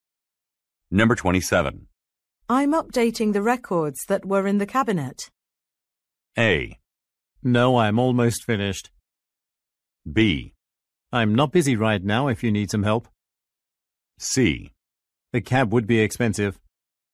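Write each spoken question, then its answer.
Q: I'm updating the records that were in the cabinet.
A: B: I'm not busy right now if you need some help.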